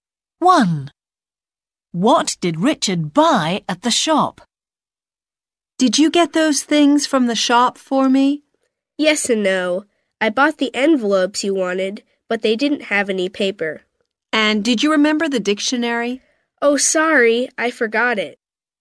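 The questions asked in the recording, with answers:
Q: What did Richard buy at the shop?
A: envelopes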